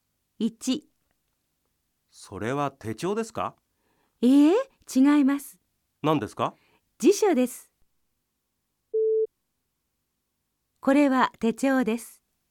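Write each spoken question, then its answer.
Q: これは手帳です。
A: ×(辞書です)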